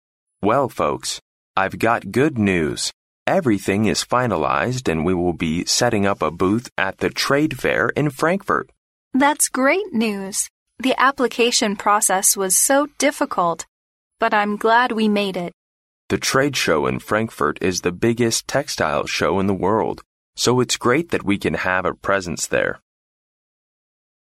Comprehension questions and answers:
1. What are the speakers going to do according to the conversation?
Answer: To set up a booth at the Frankfurt trade fair.

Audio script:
M: Well, folks...I've got good news! Everything is finalized and we'll be setting up a booth at the trade fair in Frankfurt!
W: That's great news! The application process was so difficult, but I'm glad we made it!
M: The trade show in Frankfurt is the biggest textile show in the world, so it's great that we can have a presence there!